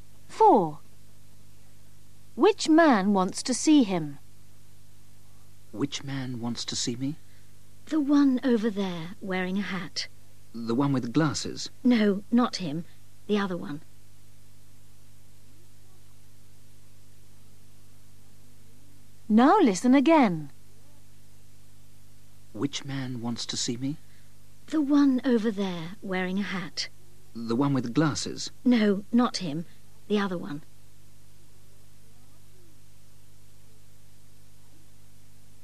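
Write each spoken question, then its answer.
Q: Which man wants to see him?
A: the man wearing a hat, without glasses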